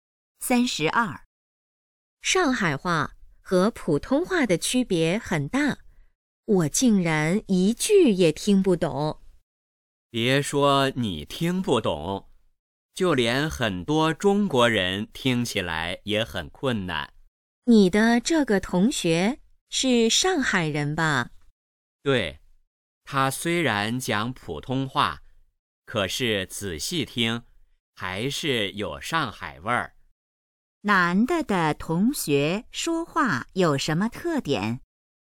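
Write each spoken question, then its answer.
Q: 男的同学说话有什么特点?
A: 讲普通话带上海口音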